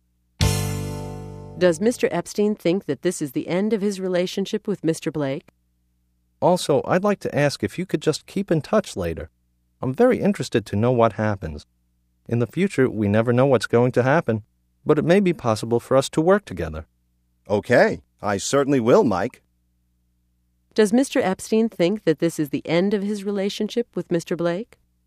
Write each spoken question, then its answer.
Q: Does Mr. Epstein think that this is the end of his relationship with Mr. Blake?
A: No. He hopes that it will be possible for them to work together in the future.